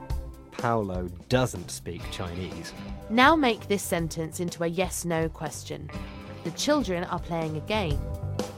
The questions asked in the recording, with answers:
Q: Now make this sentence into a yes-no question.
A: Are the children playing a game?